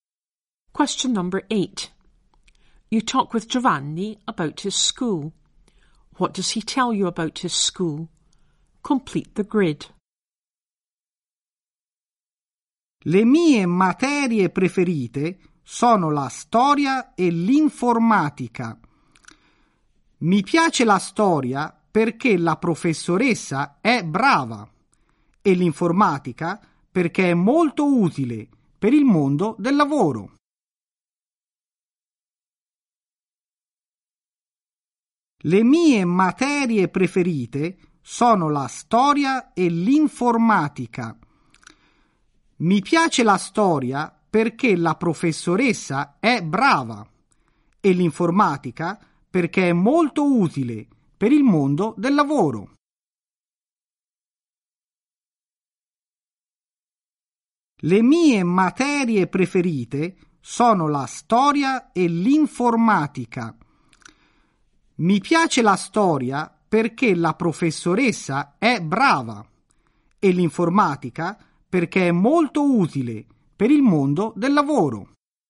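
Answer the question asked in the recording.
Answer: Favourite subjects history (teacher is good) and IT (useful for work)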